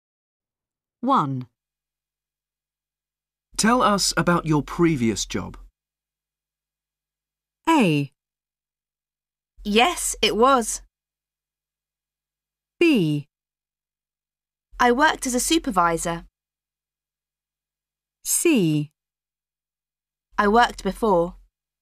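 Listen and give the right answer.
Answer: B: I worked as a supervisor.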